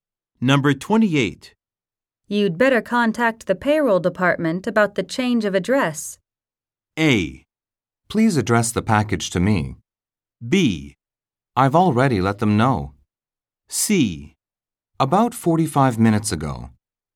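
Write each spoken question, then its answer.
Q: You'd better contact the payroll department about the change of address.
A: B: I've already let them know.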